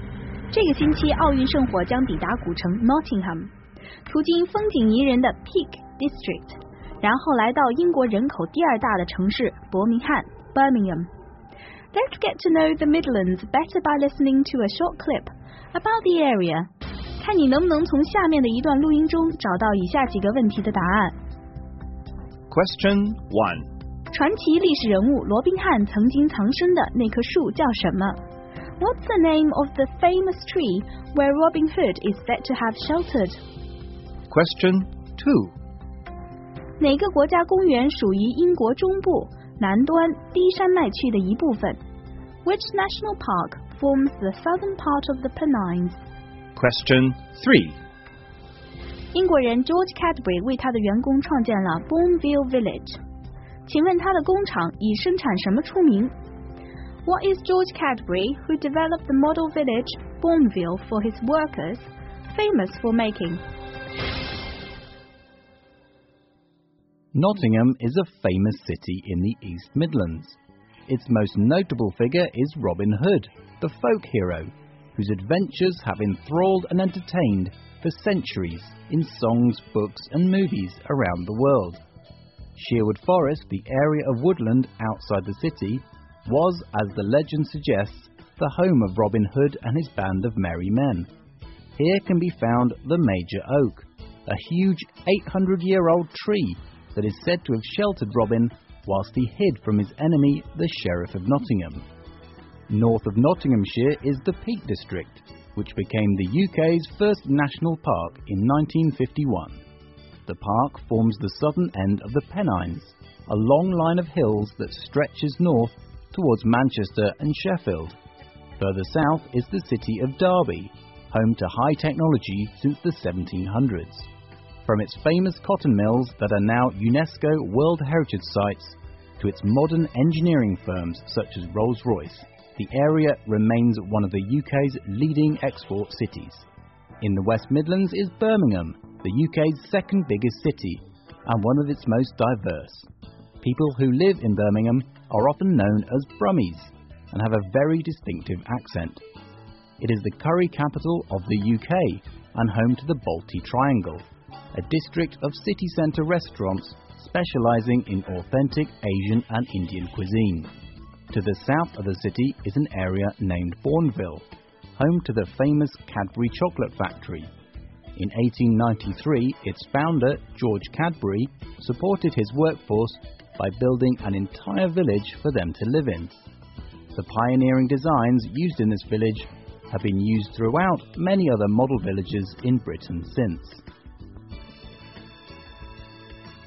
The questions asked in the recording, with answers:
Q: What's the name of the famous tree where Robin Hood is said to have sheltered?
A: The famous tree where Robin Hood is said to have sheltered is called the Major Oak.

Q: Which national park forms the southern part of the Pennines?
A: The Peak District is the name of the southern part of the Pennines.

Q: What is George Cadbury, who developed the model village Bourneville for his workers, famous for making?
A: George Cadbury, who developed the model village for his workers, is famous for making chocolate.